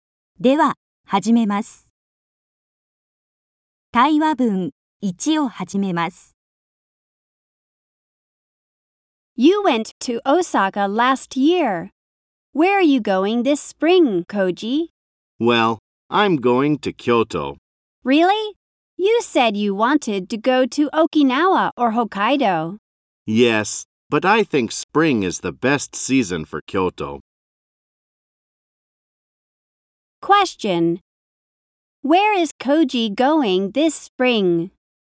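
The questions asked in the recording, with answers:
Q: Where is Koji going this spring?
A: To Kyoto.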